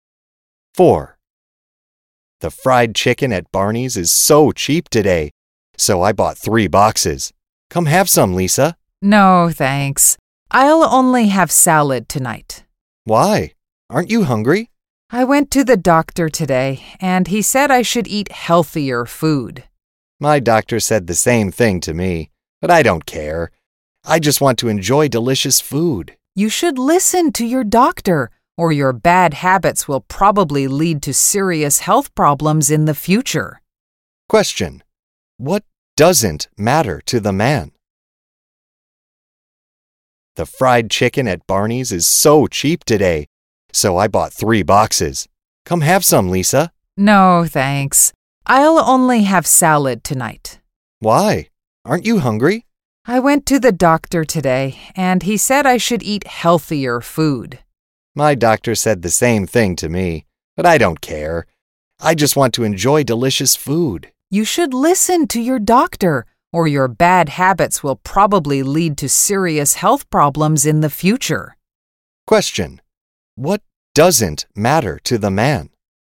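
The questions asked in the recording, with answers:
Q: What doesn't matter to the man?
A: His doctor's advice to eat healthier food.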